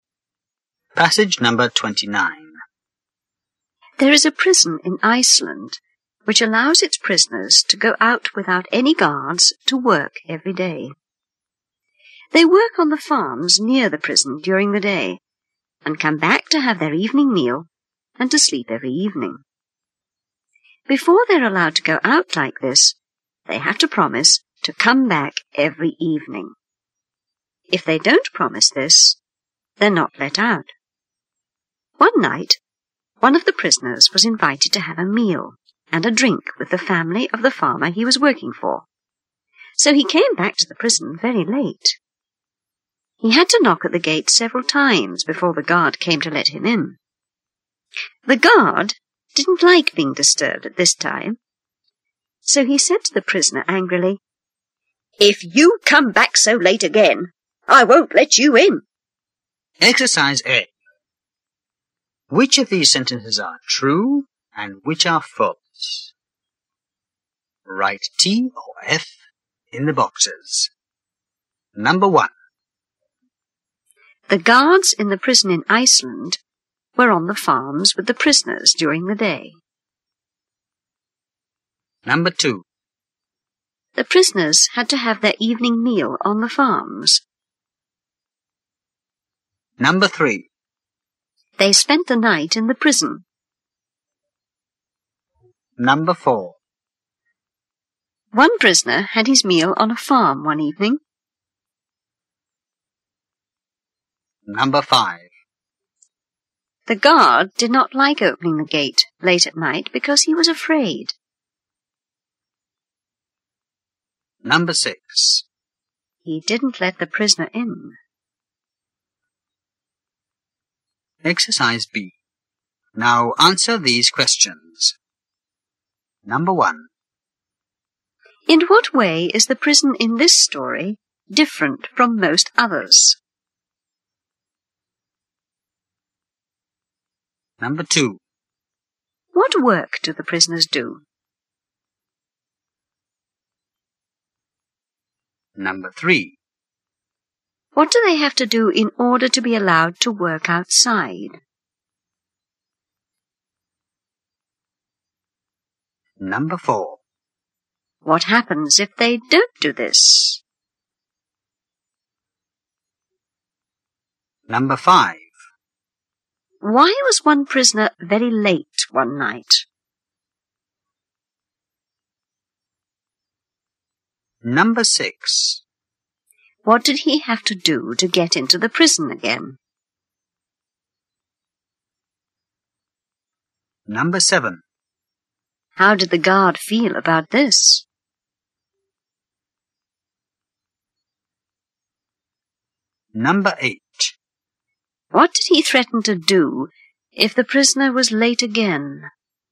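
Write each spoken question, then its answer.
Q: The guards in the prison in Iceland were on the farms with the prisoners during the day.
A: False

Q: The prisoners had to have their evening meal on the farms.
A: False

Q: They spent the night in the prison.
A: True

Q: One prisoner had his meal on a farm one evening.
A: True

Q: The guard did not like opening the gate late at night because he was afraid.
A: False

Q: He didn't let the prisoner in.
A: False

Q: In what way is the prison in this story different from most others?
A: Prisoners go out to work every day without guards

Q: What work do the prisoners do?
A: They work on farms near the prison

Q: What do they have to do in order to be allowed to work outside?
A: Promise to come back every evening

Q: What happens if they don't do this?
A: They are not let out

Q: Why was one prisoner very late one night?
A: He had a meal and a drink with the farmer's family

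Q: What did he have to do to get into the prison again?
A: Knock at the gate several times

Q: How did the guard feel about this?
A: Angry; he didn't like being disturbed

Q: What did he threaten to do if the prisoner was late again?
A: Not let him in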